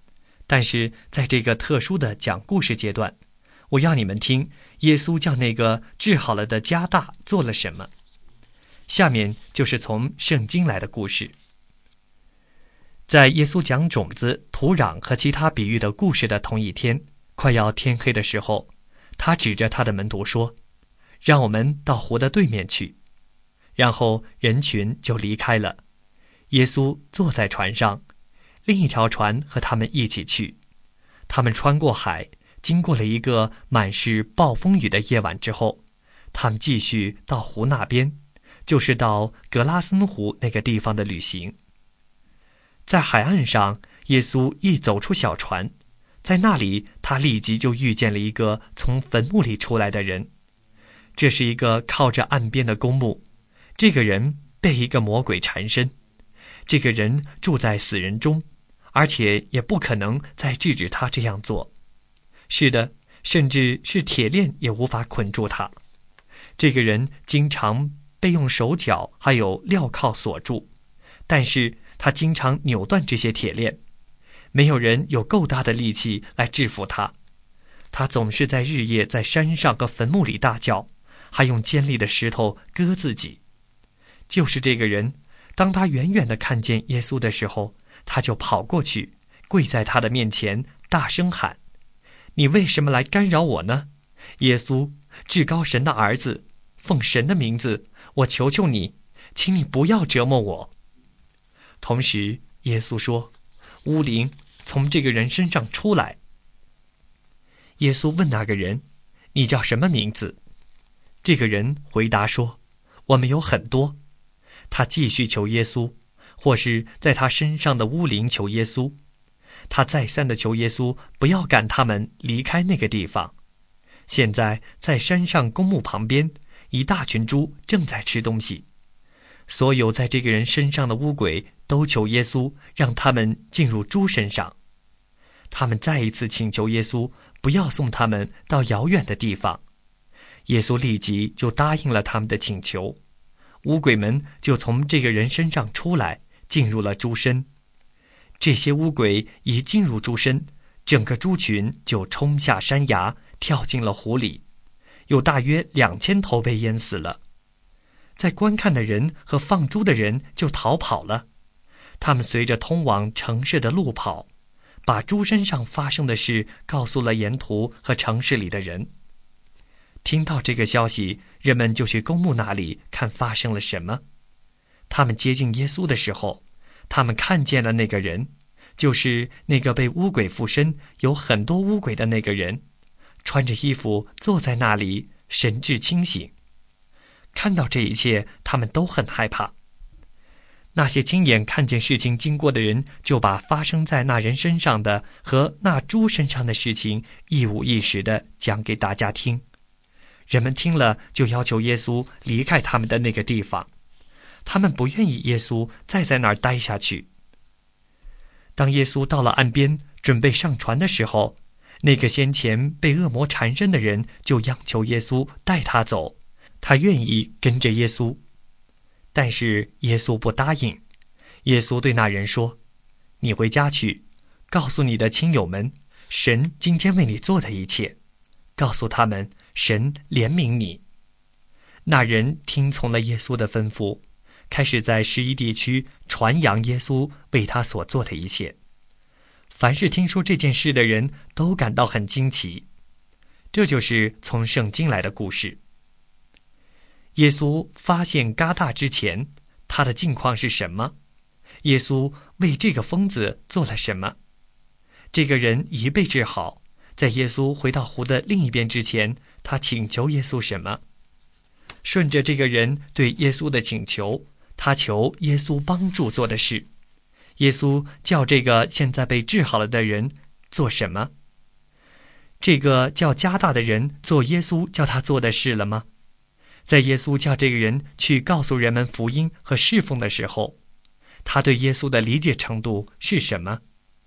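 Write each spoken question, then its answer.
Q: 耶稣发现加大之前,他的境况是什么?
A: 被很多巫鬼附身,住在坟墓里,日夜大叫,用石头割自己,铁链也捆不住他

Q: 耶稣为这个疯子做了什么?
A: 把巫鬼从他身上赶出来,让巫鬼进入猪群,治好了他

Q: 这个人已被治好,在耶稣回到湖的另一边之前, 他请求耶稣什么。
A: 求耶稣带他走,让他跟着耶稣

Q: 顺着这个人对耶稣的请求,他求耶稣帮助做的事,耶稣叫这个现在被治好了的人做什么?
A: 回家告诉亲友神为他做的一切,神怜悯他

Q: 这个叫加大的人做耶稣叫他做的事了吗?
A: 做了,他在十一地区传扬耶稣为他所做的一切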